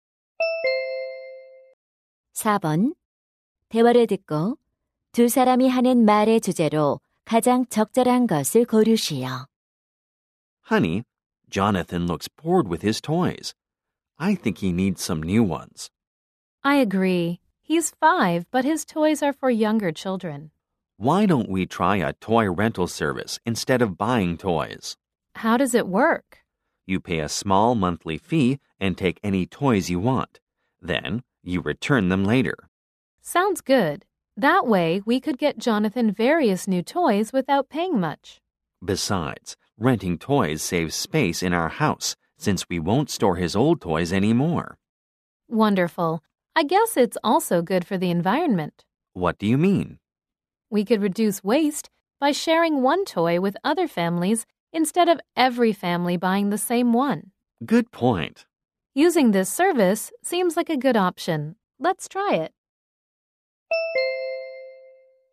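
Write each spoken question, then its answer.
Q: 대화를 듣고 두 사람이 하는 말의 주제로 가장 적절한 것을 고르시오.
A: 장난감 대여 서비스 이용의 장점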